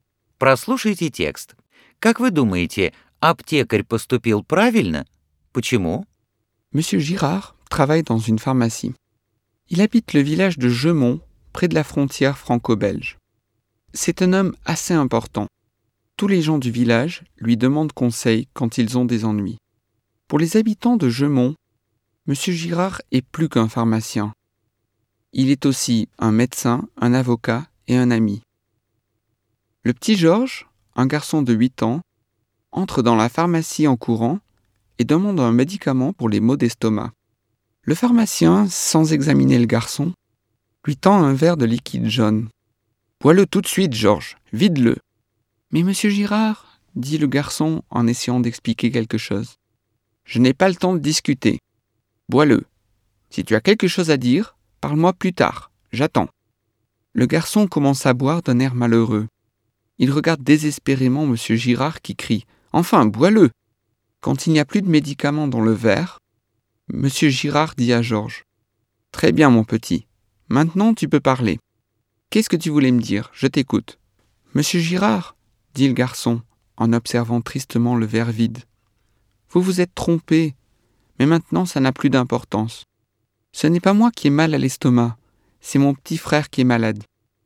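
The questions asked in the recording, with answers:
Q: Как вы думаете, аптекарь поступил правильно?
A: Нет: он не выслушал мальчика и дал ему лекарство, а болел его младший брат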